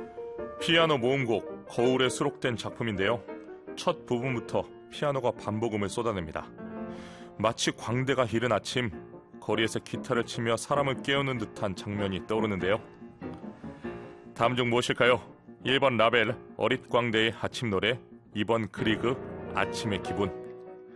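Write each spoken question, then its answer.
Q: 다음 중 무엇일까요? 1번 라벨, 어릿 광대의 아침 노래, 2번 그리그, 아침의 기분.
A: 1: 라벨, 어릿광대의 아침 노래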